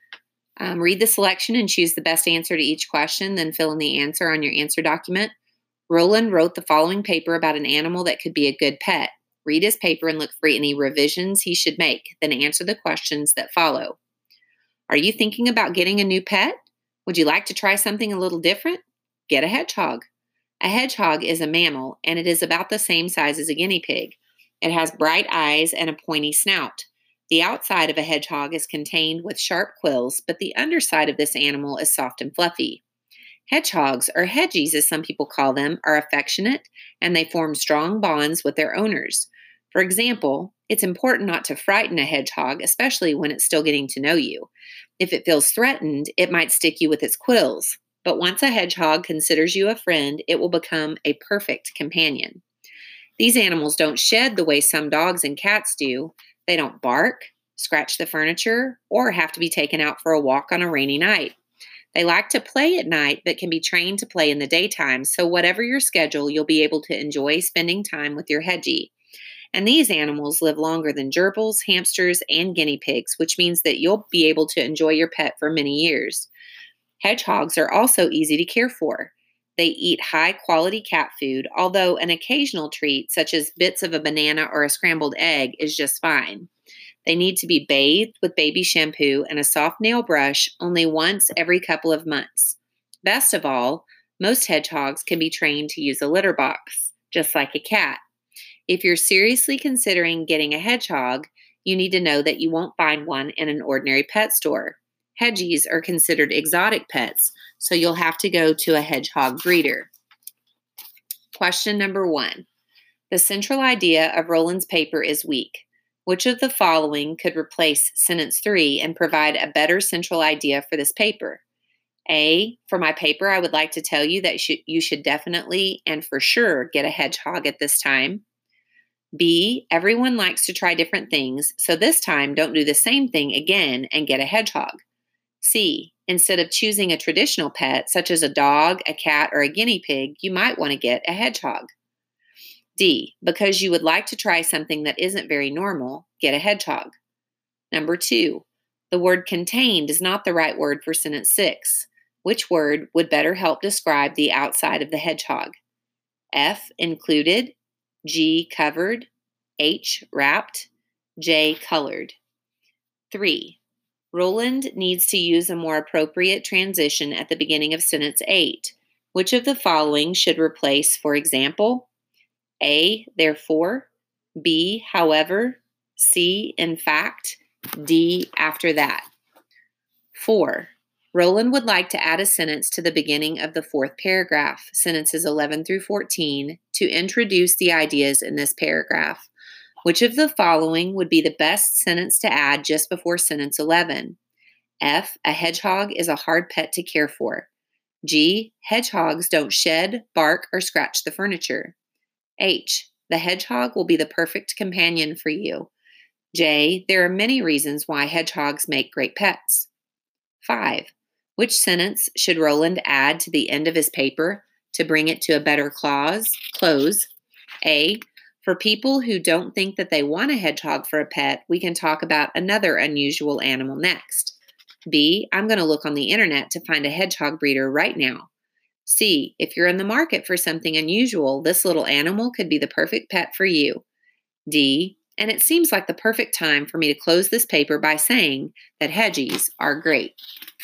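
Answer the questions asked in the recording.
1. C: Instead of choosing a traditional pet, such as a dog, a cat, or a guinea pig, you might want to get a hedgehog.
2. G: Covered
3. B: However
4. J: There are many reasons why hedgehogs make great pets.
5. C: If you're in the market for something unusual, this little animal could be the perfect pet for you.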